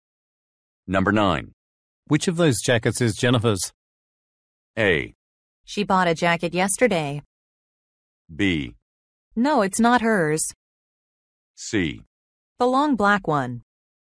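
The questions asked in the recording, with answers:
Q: Which of those jackets is Jennifer's?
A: C: The long black one.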